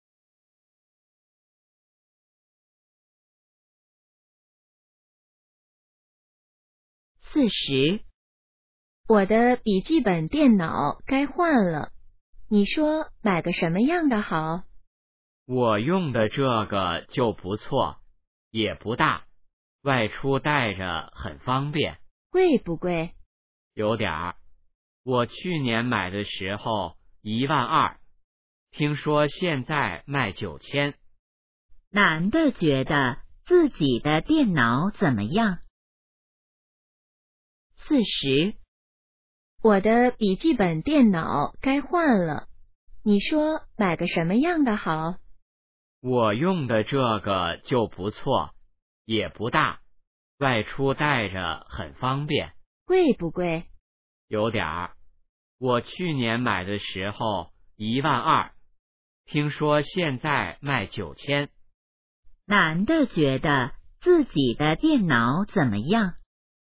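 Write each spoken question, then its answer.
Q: 男的觉得自己的电脑怎么样?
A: 不错,不大,带着方便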